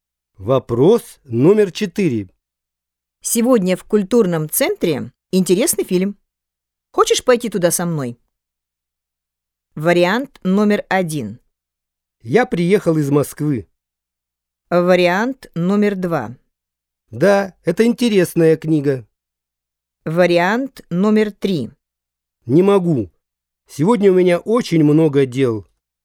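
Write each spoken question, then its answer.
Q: Хочешь пойти туда со мной?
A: 3: Не могу. Сегодня у меня очень много дел.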